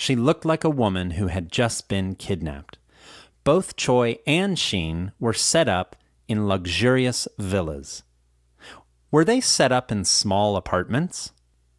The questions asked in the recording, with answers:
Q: Were they set up in small apartments?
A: No, they weren't set up in small apartments.